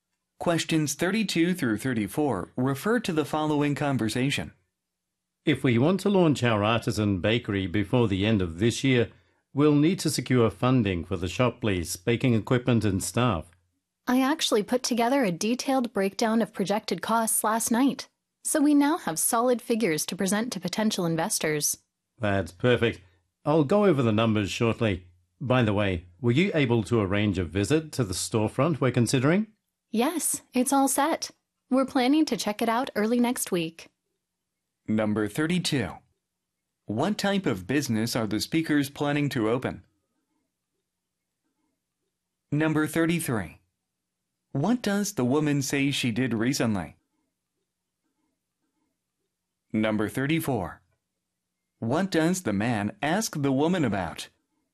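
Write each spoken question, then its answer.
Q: What type of business are the speakers planning to open?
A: A bakery

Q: What does the woman say she did recently?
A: Prepared a detailed breakdown of projected costs

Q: What does the man ask the woman about?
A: Whether she arranged a visit to the storefront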